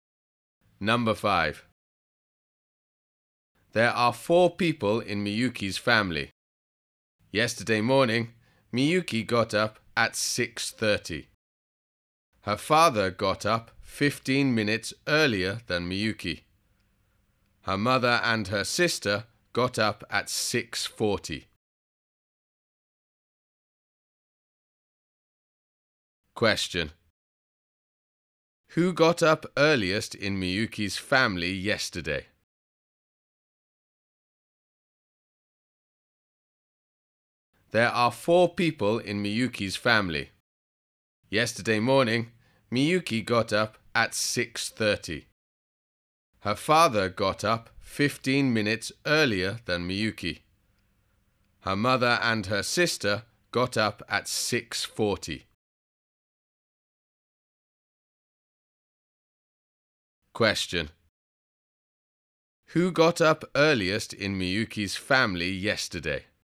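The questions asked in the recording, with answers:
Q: Who got up earliest in Miyuki's family yesterday?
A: Her father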